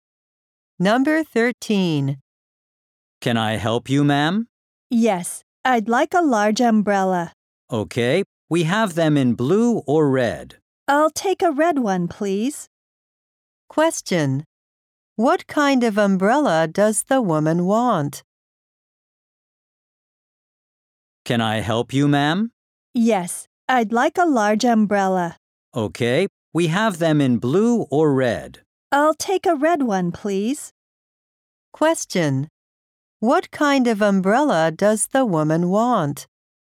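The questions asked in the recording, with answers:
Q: What kind of umbrella does the woman want?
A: A large red one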